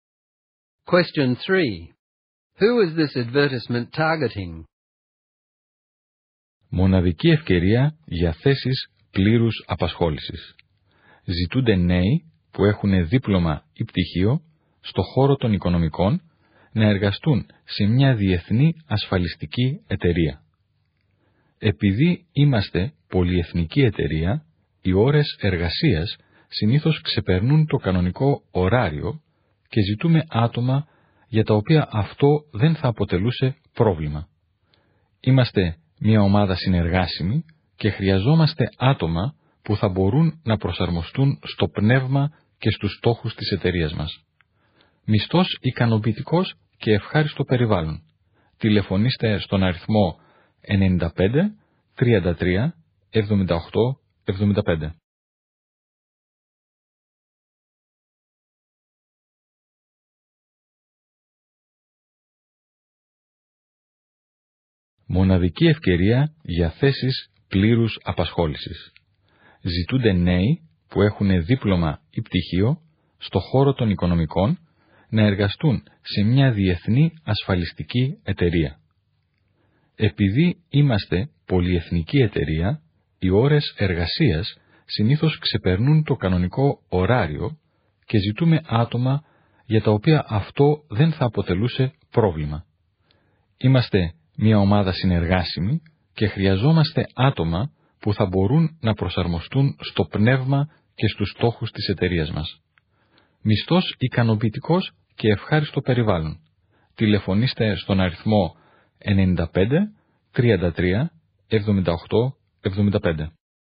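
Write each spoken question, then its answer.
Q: Who is this advertisement targeting?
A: Young people with a finance diploma or degree who can work beyond normal hours and work well in a team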